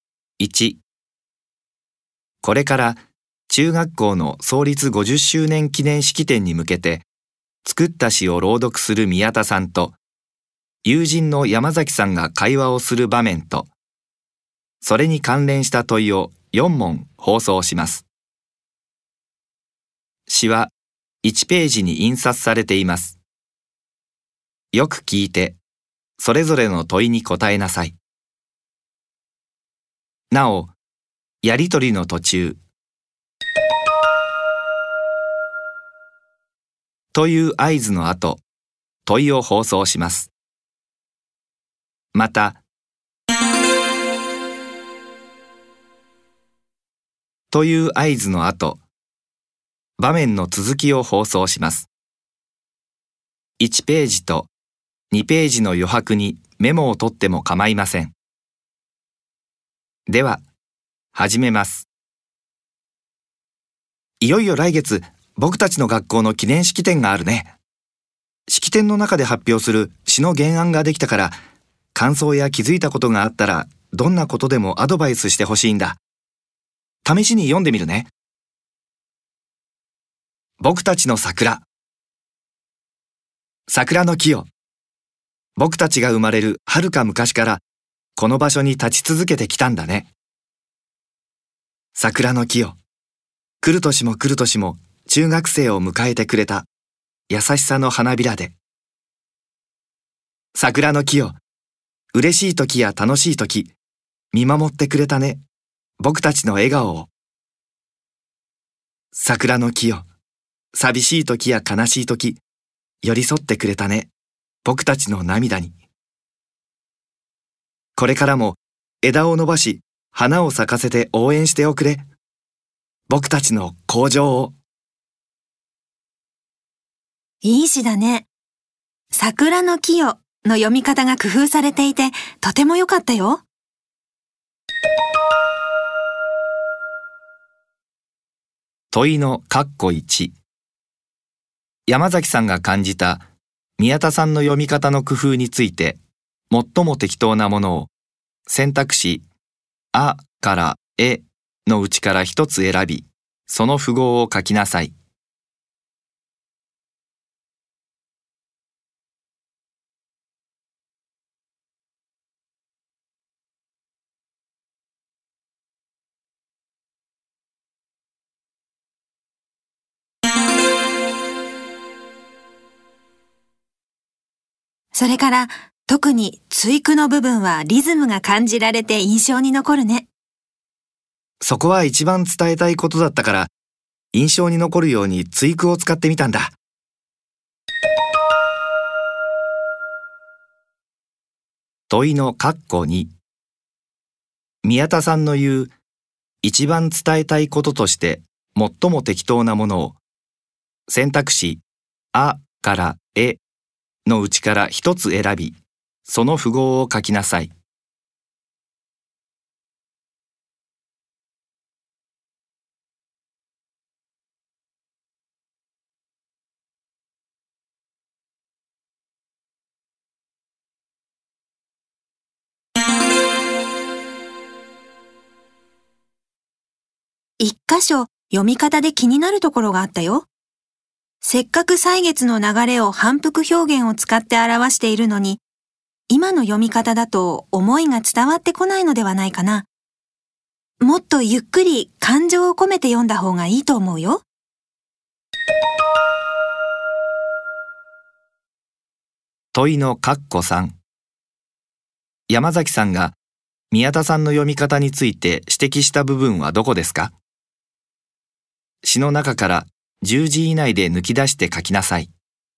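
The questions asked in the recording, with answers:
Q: 問いの括弧3。山崎さんが宮田さんの読み方について指摘した部分はどこですか?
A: 来る年も来る年も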